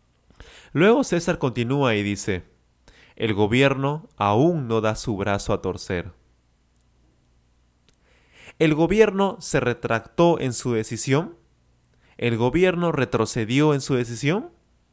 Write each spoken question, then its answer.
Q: El gobierno se retractó en su decisión.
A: No, claro que no. El gobierno de Ecuador no dio su brazo a torcer, es decir, no se retractó en su decisión